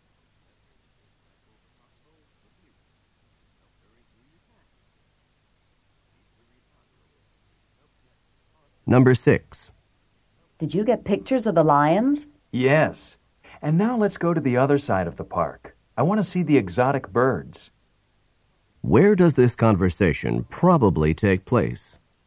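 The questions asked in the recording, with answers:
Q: Where does this conversation probably take place?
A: At a zoo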